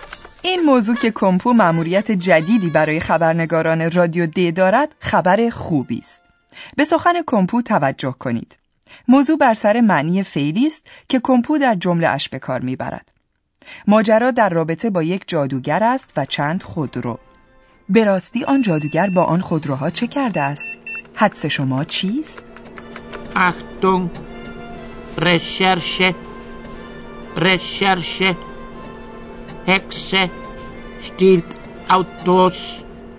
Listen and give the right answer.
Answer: کسی با سوء استفاده از ایام کارناوال خود را به شکل یک جادوگر درآورده تا بدین طریق بتواند خودروی مردم را به سرقت ببرد.